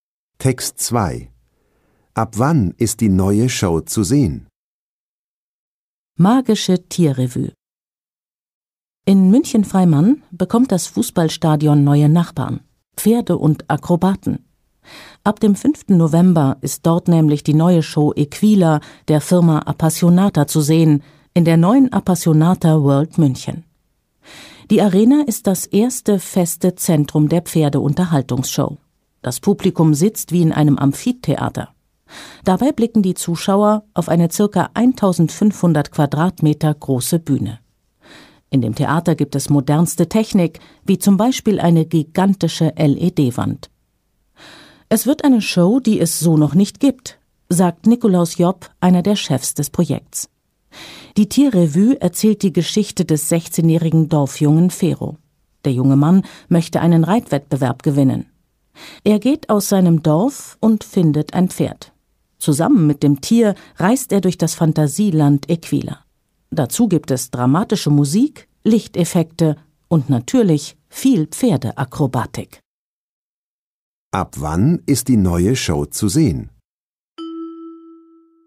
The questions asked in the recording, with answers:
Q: Ab wann ist die neue Show zu sehen?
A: Ab dem 5. November.